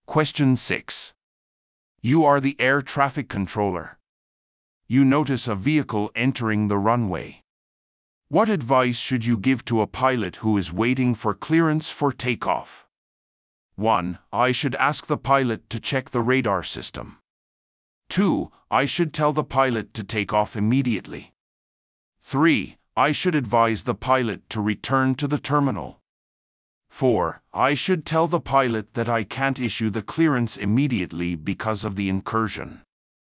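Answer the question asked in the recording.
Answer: 4: I should tell the pilot that I can't issue the clearance immediately because of the incursion.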